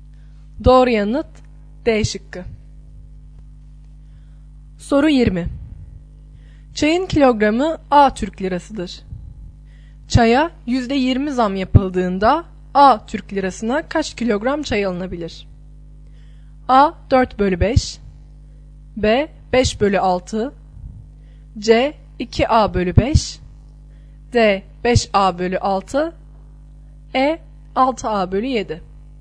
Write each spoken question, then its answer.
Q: Çaya %20 zam yapıldığında A Türk lirasına kaç kilogram çay alınabilir?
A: Doğru yanıt B şıkkı.